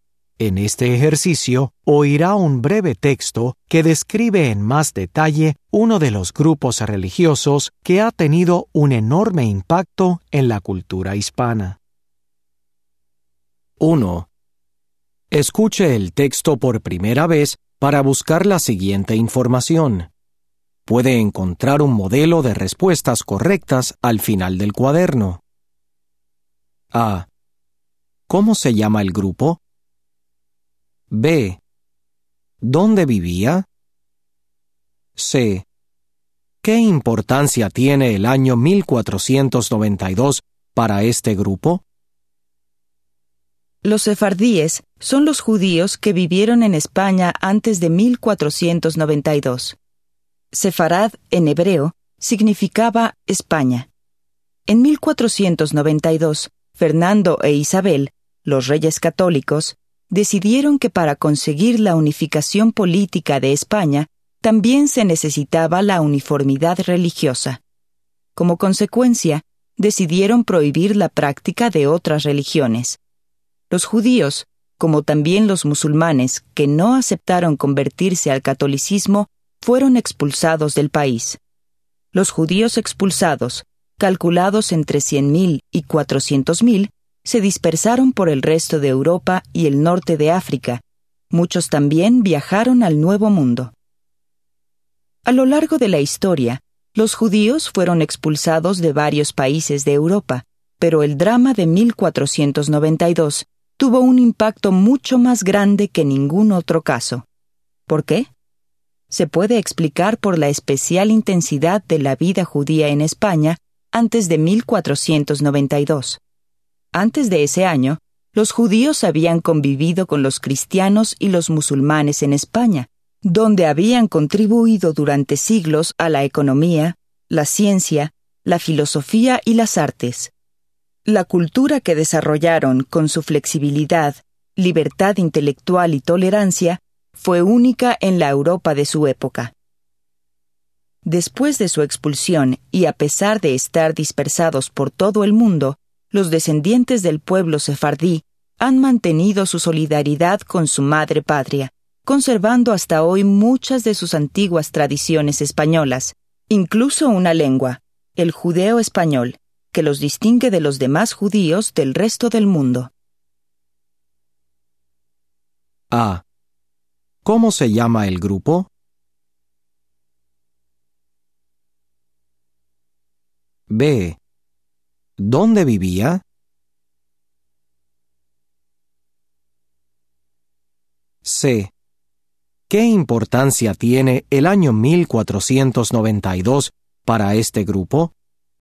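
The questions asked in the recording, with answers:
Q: ¿Cómo se llama el grupo?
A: Los sefardíes

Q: ¿Dónde vivía?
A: En España

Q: ¿Qué importancia tiene el año 1492 para este grupo?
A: Fue el año en que los Reyes Católicos los expulsaron de España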